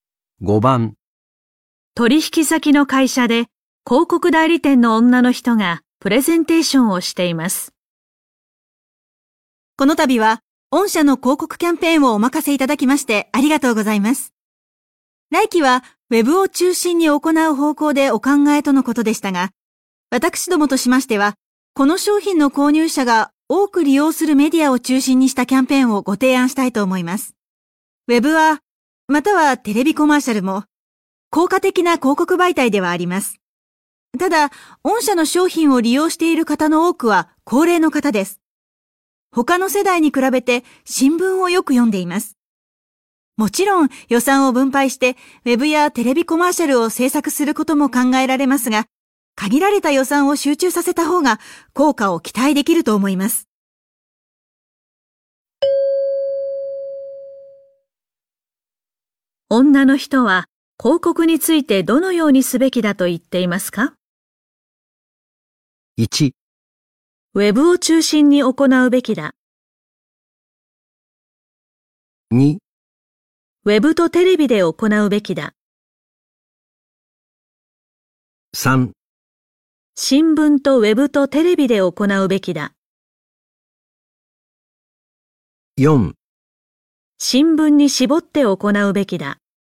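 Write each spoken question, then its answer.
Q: 女の人は広告についてどのようにすべきだと言っていますか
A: 4: 新聞に絞って行うべきだ。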